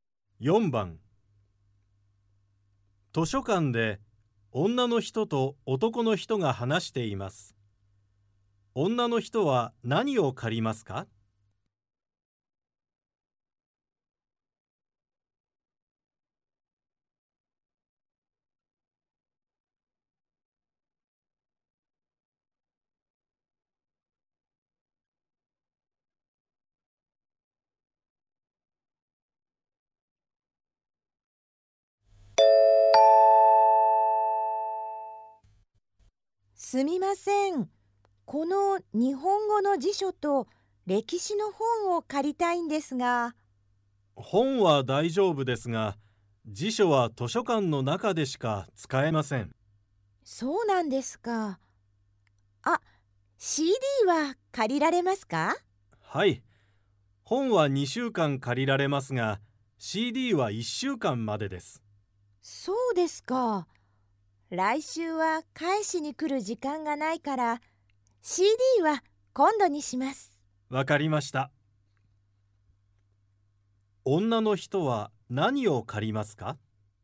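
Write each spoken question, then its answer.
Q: 女の人は何を借りますか?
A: 歴史の本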